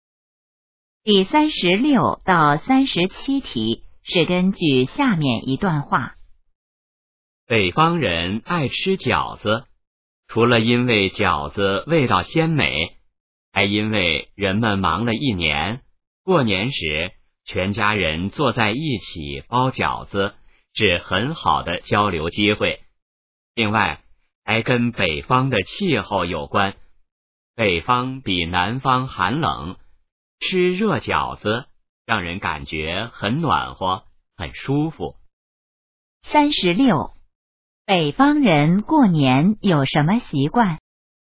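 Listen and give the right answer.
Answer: 全家人一起包饺子、吃饺子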